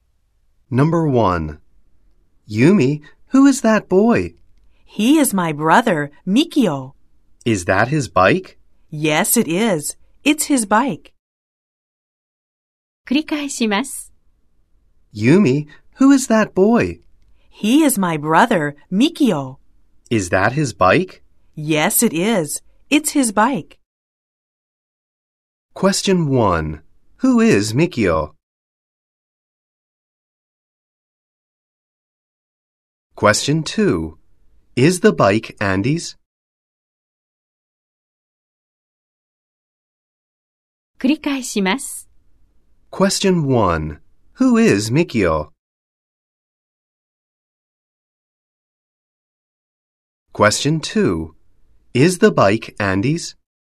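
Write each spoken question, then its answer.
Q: Who is Mikio?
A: He is Yumi's brother.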